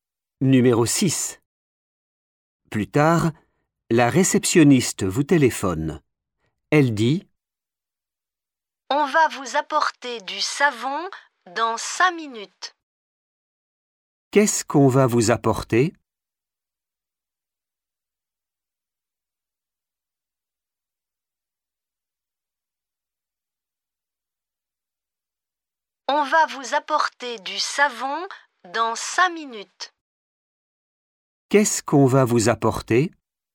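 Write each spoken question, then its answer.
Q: Qu'est-ce qu'on va vous apporter?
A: du savon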